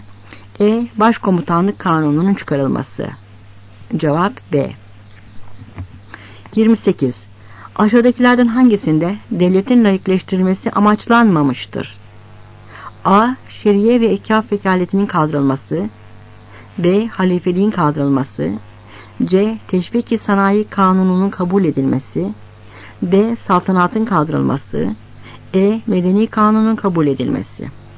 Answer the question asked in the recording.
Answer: Cevap C.